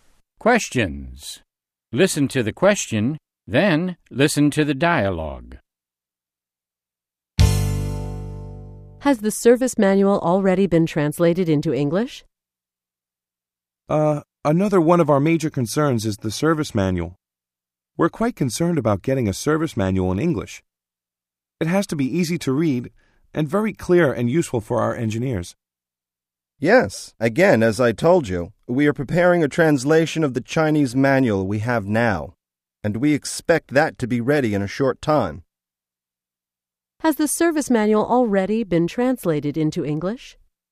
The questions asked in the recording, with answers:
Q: Has the service manual already been translated into English?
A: No, it hasn't. It is still being translated.